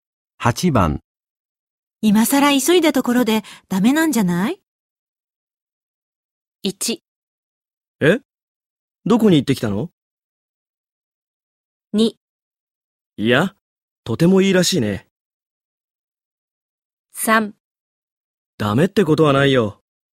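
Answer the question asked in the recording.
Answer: 3: ダメってことはないよ。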